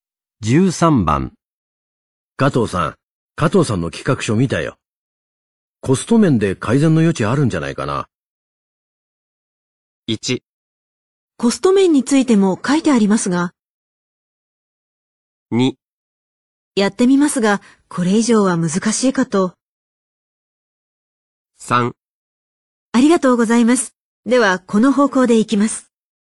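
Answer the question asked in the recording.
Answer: 2: やってみますが、これ以上は難しいかと。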